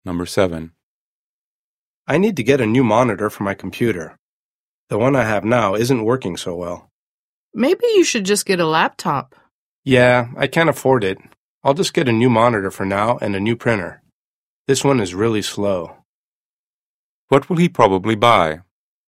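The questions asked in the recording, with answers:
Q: What will he probably buy?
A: A new monitor and a new printer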